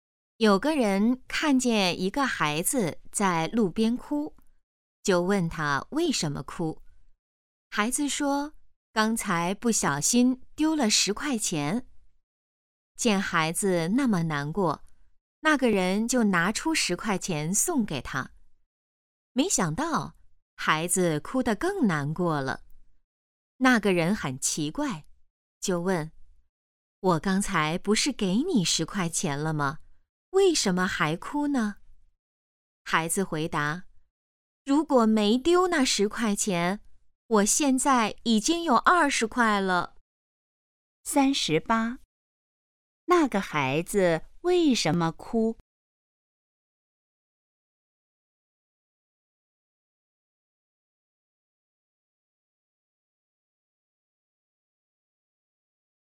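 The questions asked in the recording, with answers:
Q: 那个孩子为什么哭?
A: 丢了10块钱

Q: 那个孩子现在有多少钱?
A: 10块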